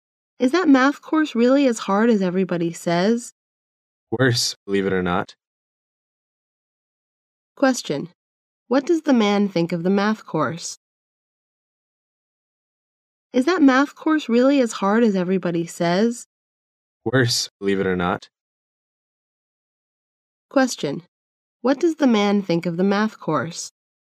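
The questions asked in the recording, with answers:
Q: What does the man think of the math course?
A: It is even harder than people say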